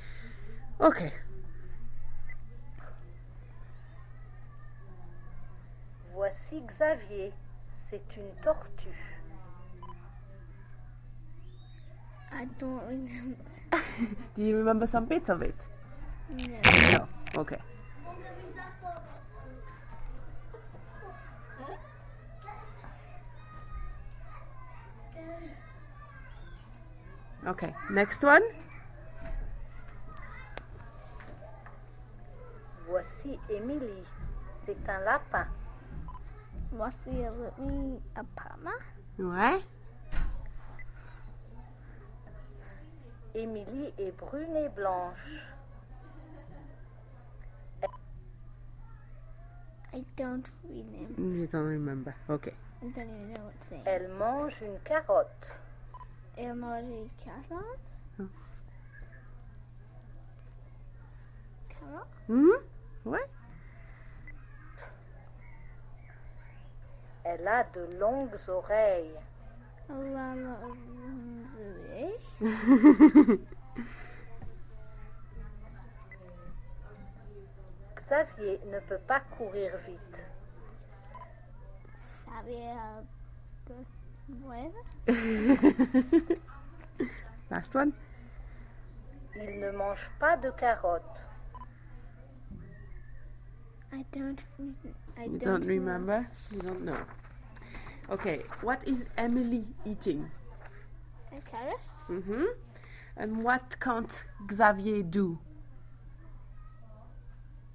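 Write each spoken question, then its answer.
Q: what is Emily eating?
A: A carrot

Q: And what can't Xavier do?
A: Run fast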